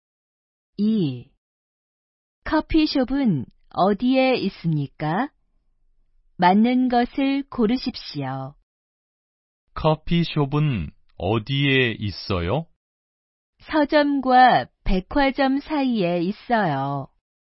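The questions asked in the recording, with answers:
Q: 커피숍은 어디에 있습니까?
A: 서점과 백화점 사이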